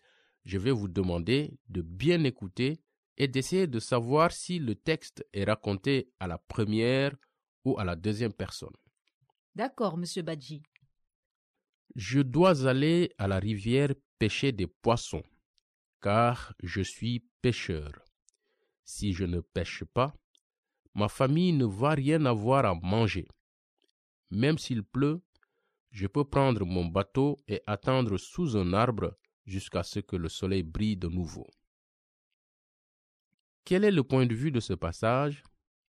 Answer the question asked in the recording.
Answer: À la première personne?